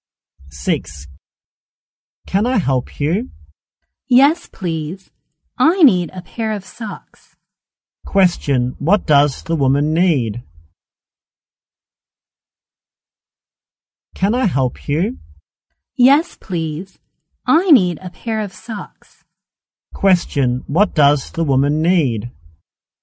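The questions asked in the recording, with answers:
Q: Question, what does the woman need?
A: A pair of socks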